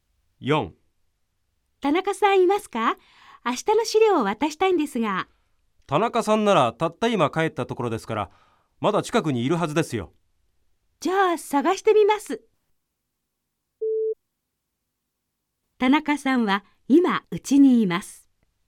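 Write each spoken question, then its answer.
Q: 田中さんは今うちにいます。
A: ×(まだ会社の近くにいる)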